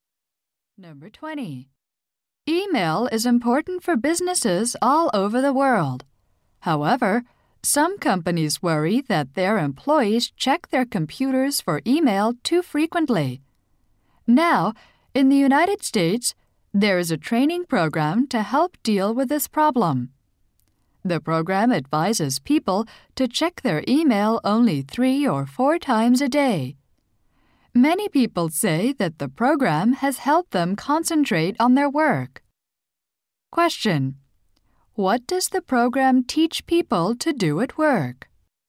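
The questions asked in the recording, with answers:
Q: What does the program teach people to do at work?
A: Check email only 3 or 4 times a day.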